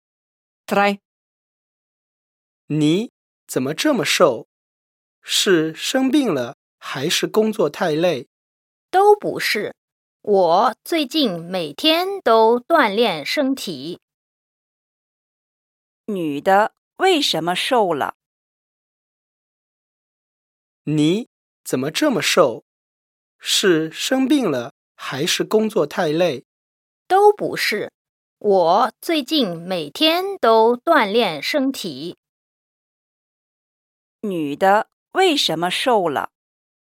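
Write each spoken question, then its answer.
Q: 女的为什么瘦了?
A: 每天都锻炼身体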